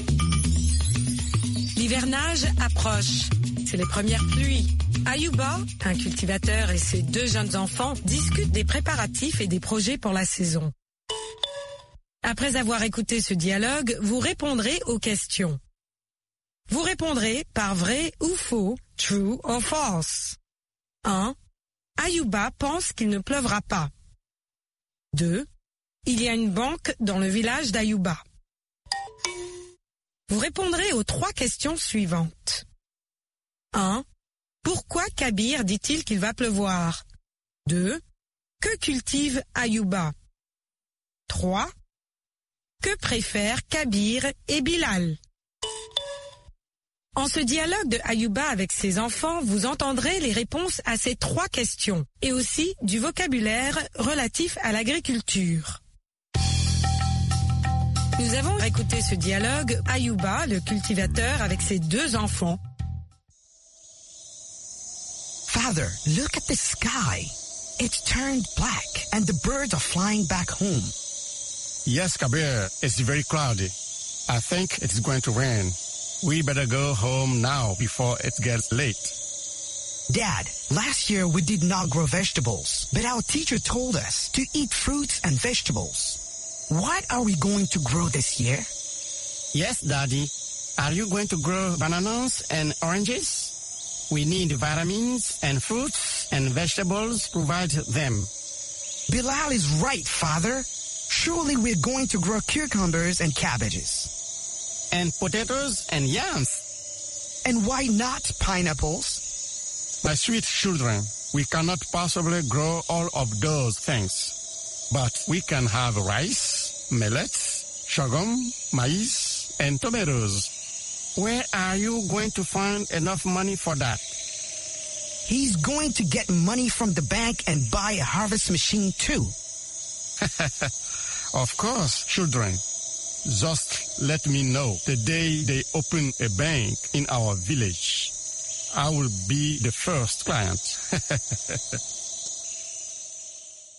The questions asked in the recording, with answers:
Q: Ayuba pense qu'il ne pleuvra pas.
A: L'énoncé 1 est faux.

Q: Il y a une banque dans le village d'Ayuba.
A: L'énoncé 2 est faux.

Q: Pourquoi Kabir dit-il qu'il va pleuvoir?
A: Parce que le ciel est nuageux.

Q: Que cultive Ayuba?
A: Ayuba cultive du riz, du mil, du sorgho, du maïs et de la tomate.

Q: Que préfèrent Kabir et Bilal?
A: Ils préfèrent les légumes et des fruits.